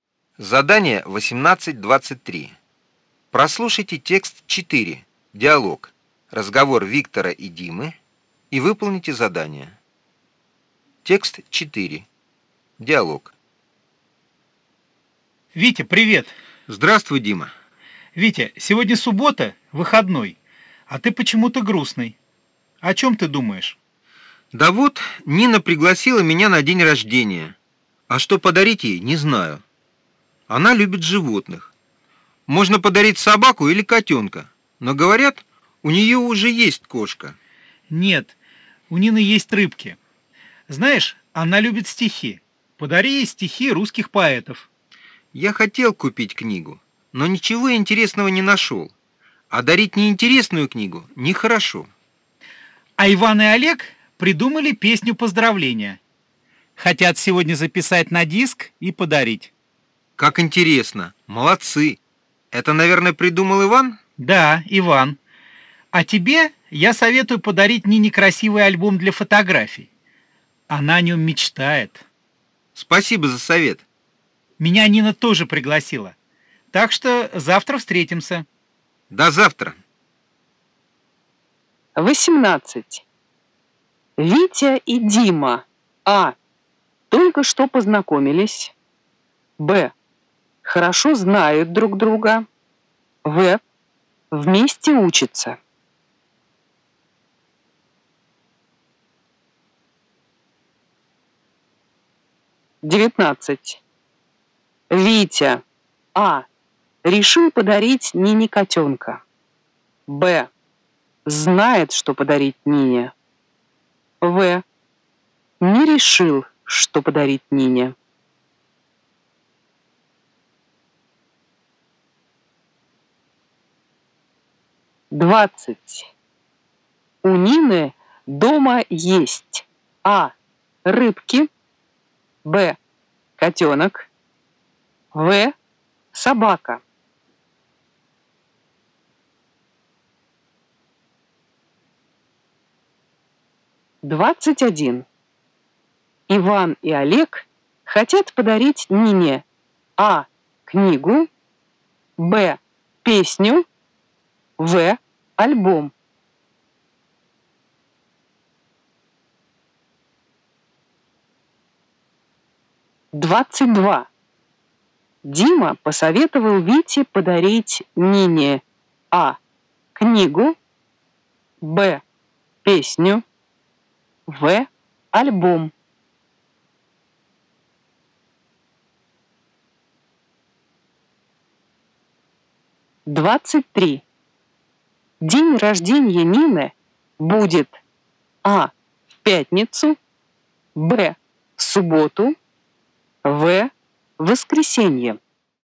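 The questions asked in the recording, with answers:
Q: Витя и Дима. А. Только что познакомились. Б. Хорошо знают друг друга. В. Вместе учатся.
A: Б: Хорошо знают друг друга

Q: Витя. А. Решил подарить Нине котенка. Б. Знает, что подарить Нине. В. Не решил, что подарить Нине.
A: В: Не решил, что подарить Нине

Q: У Нины дома есть. А. Рыбки. Б. Котенок. В. Собака.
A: А: Рыбки

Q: Иван и Олег хотят подарить Нине А. книгу, Б. песню, В. альбом.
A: Б: песню

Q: Дима посоветовал Вите подарить Нине А. книгу, Б. песню, В. альбом.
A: В: альбом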